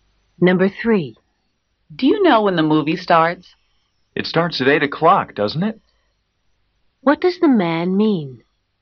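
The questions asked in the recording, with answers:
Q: What does the man mean?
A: He thinks the movie starts at 8, but he isn't sure.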